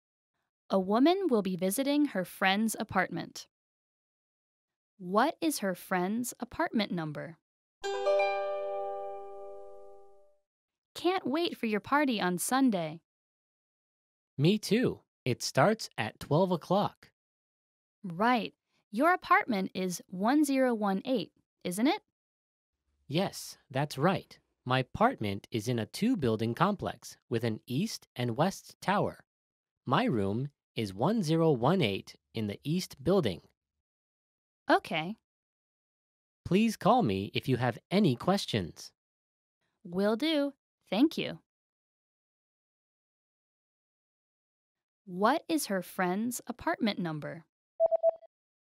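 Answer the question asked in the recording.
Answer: 1018 in the east building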